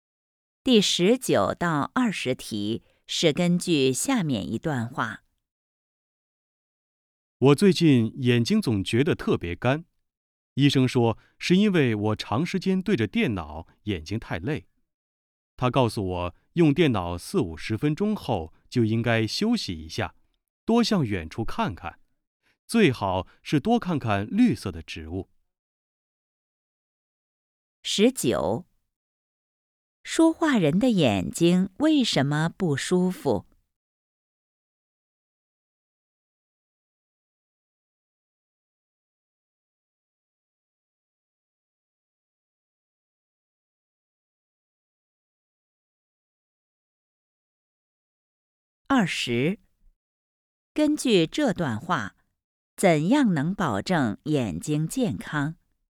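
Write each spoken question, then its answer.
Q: 说话人的眼睛为什么不舒服?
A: 长时间对着电脑,眼睛太累

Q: 根据这段话,怎样能保证眼睛健康?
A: 用电脑四五十分钟后休息,多看远处的绿色植物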